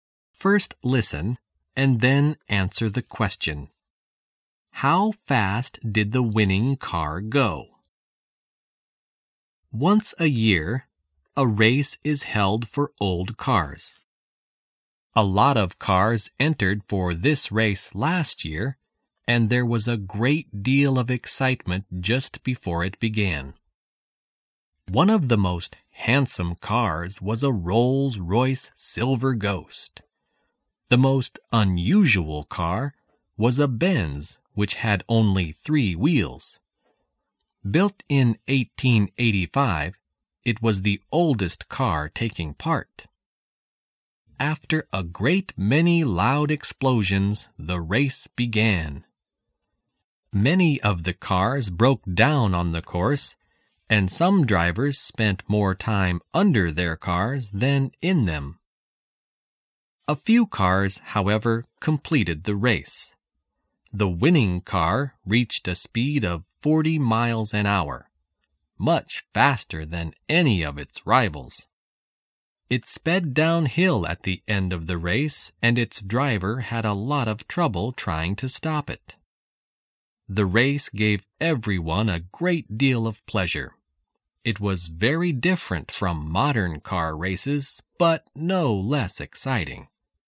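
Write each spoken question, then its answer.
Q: How fast did the winning car go?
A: 40 miles an hour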